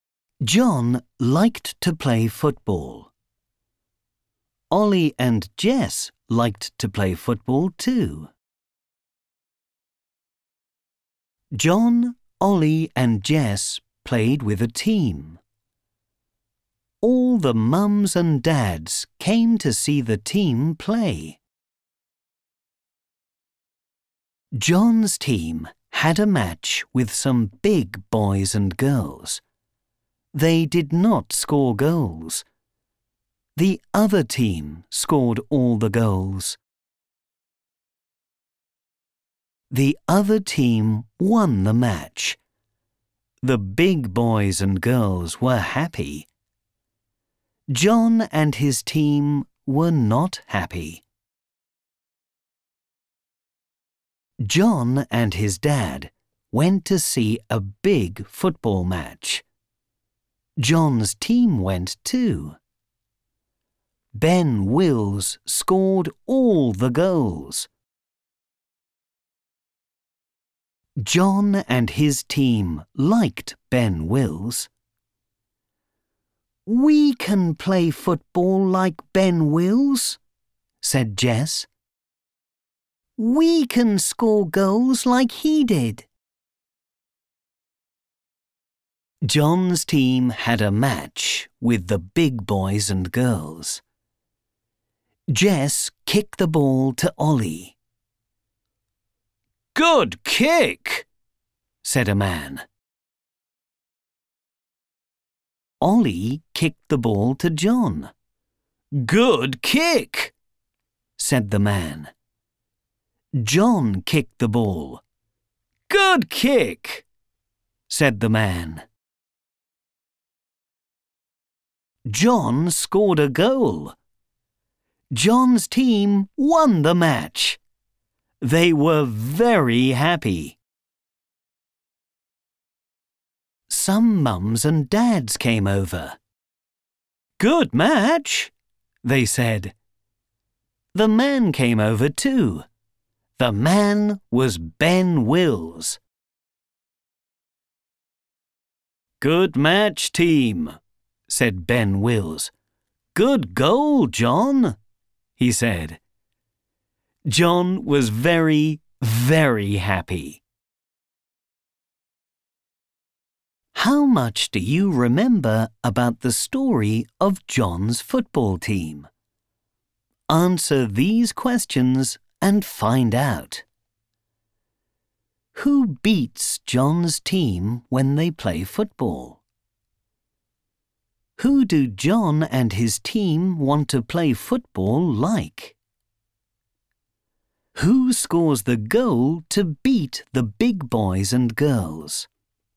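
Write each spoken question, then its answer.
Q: Who beats John's team when they play football?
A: The big boys and girls

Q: Who do John and his team want to play football like?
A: Ben Wills

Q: Who scores the goal to beat the big boys and girls?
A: John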